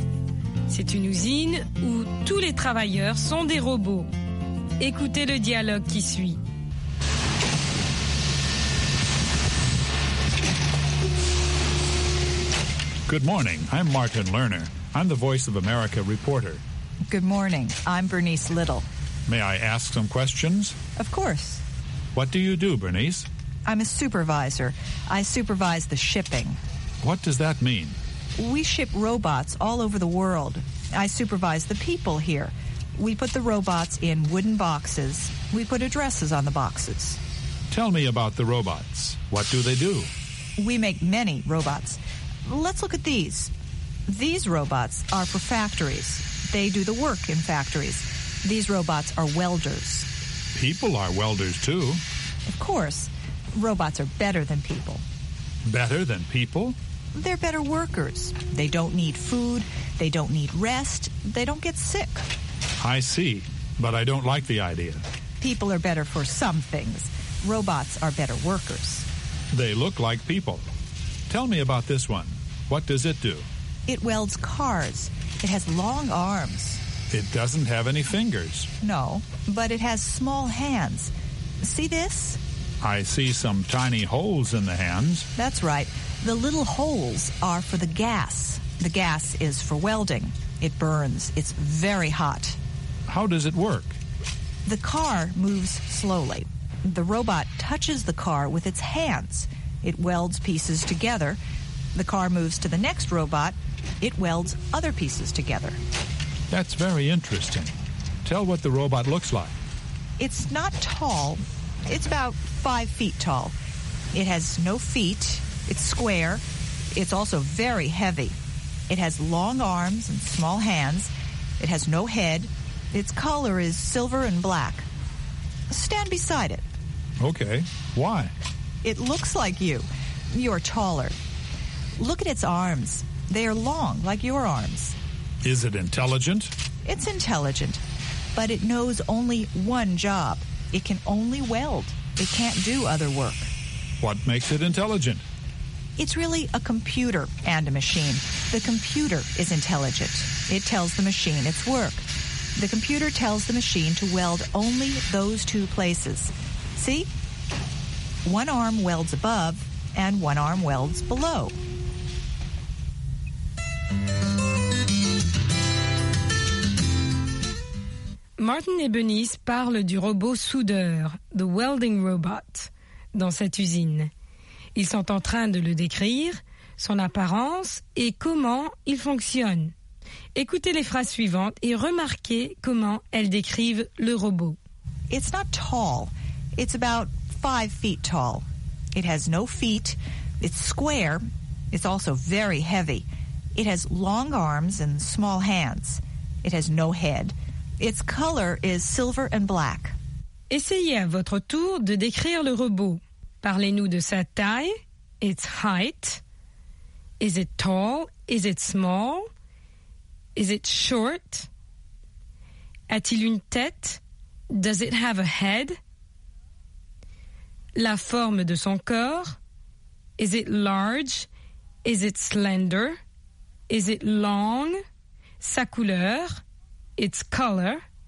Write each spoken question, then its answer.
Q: Is it tall?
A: not tall

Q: Does it have a head?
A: no head

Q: Its color?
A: silver and black